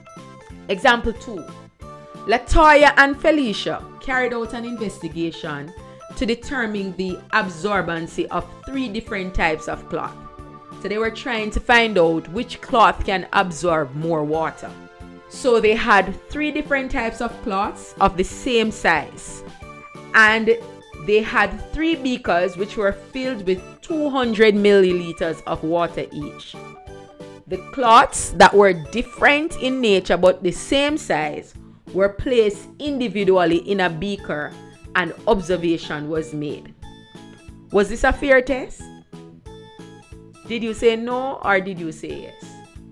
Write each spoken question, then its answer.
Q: Was this a fair test?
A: Well, the answer is yes. It was a fair test